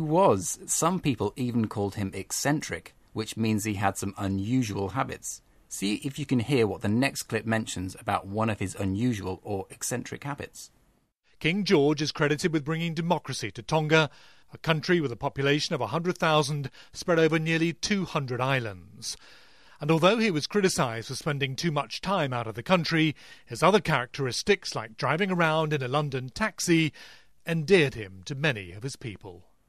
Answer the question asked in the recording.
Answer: So he drove around Tonga in a London taxi.